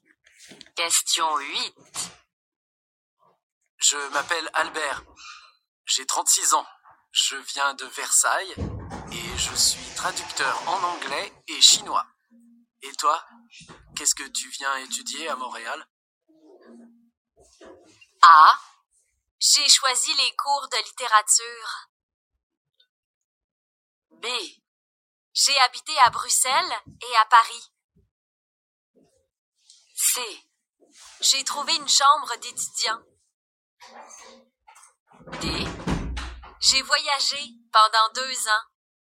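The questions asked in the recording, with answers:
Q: Et toi, qu'est-ce que tu viens étudier à Montréal ?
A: A: J'ai choisi les cours de littérature.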